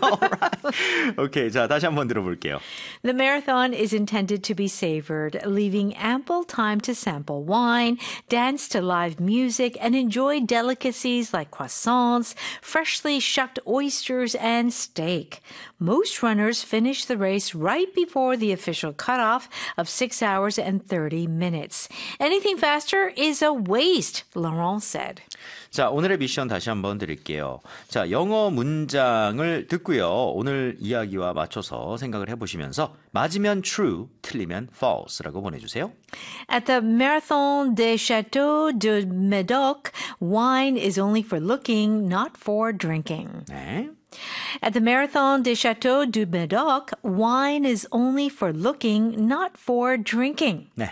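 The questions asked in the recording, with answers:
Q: At the Marathon des Châteaux du Médoc, wine is only for looking, not for drinking.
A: False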